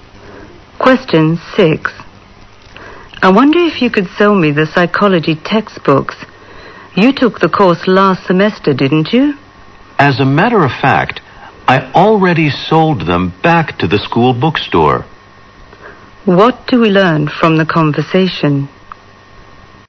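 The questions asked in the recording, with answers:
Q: What do we learn from the conversation?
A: The man already sold his psychology textbooks back to the school bookstore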